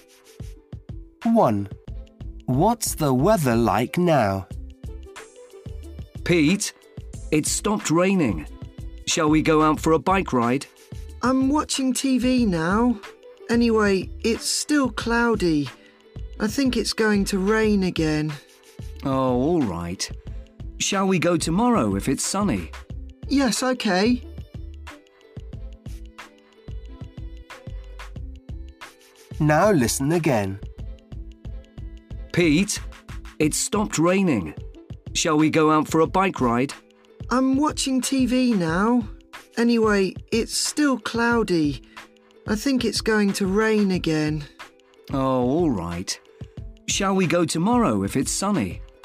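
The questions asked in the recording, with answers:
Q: What's the weather like now?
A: cloudy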